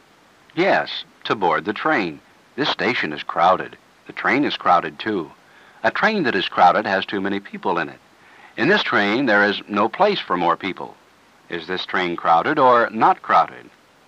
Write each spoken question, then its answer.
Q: Is this train crowded or not crowded?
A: It's crowded.